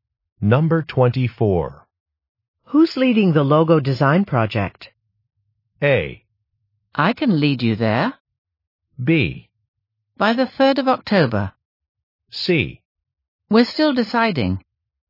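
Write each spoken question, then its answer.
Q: Who's leading the logo design project?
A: C: We're still deciding.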